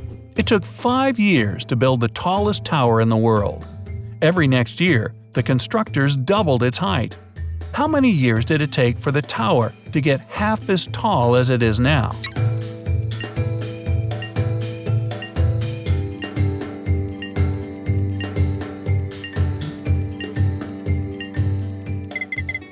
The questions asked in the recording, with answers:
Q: How many years did it take for the tower to get half as tall as it is now?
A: four years.